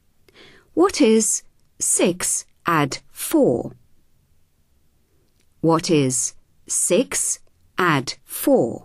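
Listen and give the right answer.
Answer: 10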